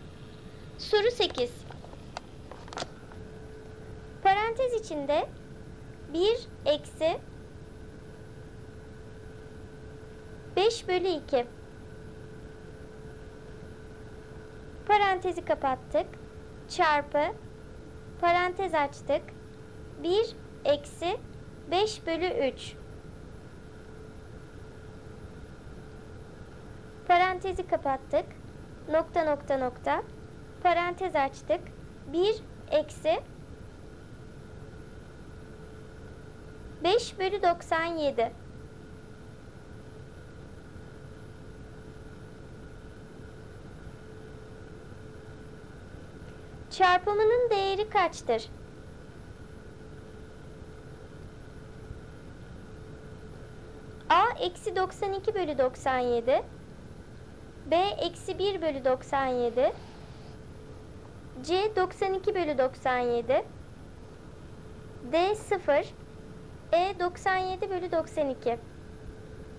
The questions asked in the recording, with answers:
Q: Çarpımının değeri kaçtır?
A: doğru cevap D seçeneği sıfır.